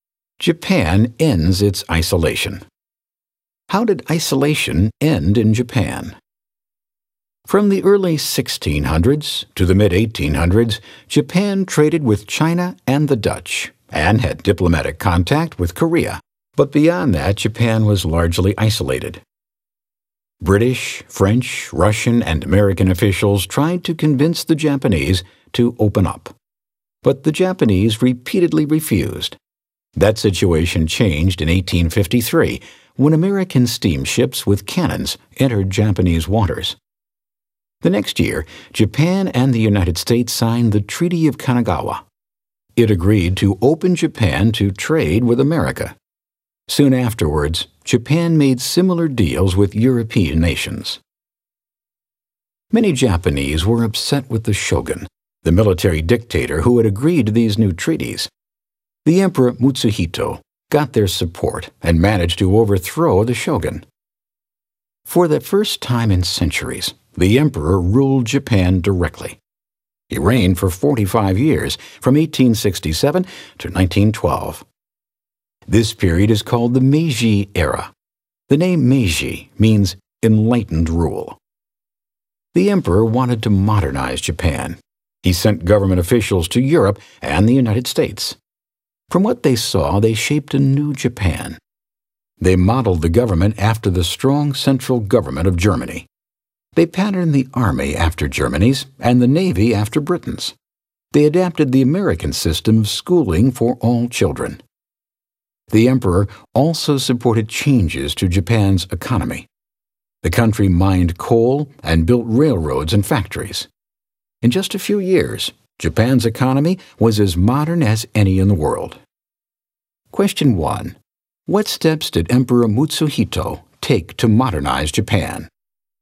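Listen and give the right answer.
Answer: He sent officials to Europe and the US, modeled the government and army on Germany's and navy on Britain's, adopted American-style schooling for all children, and built up the economy with coal mining, railroads and factories.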